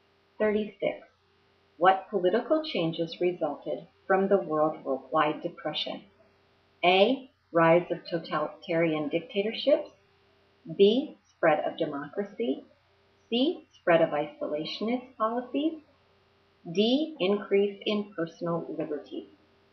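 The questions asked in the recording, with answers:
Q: What political changes resulted from the worldwide depression?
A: A: Rise of totalitarian dictatorships.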